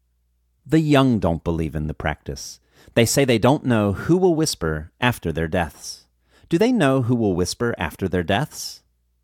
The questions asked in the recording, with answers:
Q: Do they know who will whisper after their deaths?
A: No, they don't know who will whisper after their deaths.